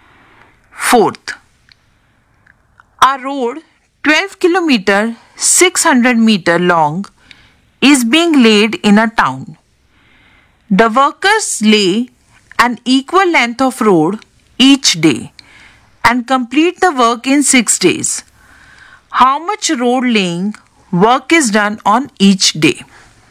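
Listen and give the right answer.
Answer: 2 km 100 m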